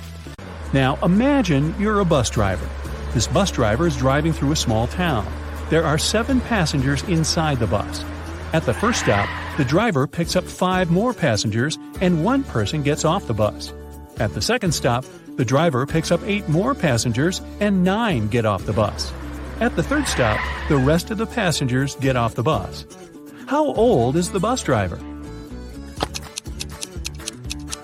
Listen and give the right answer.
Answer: As I said in the beginning, you are the bus driver. So, how old are you?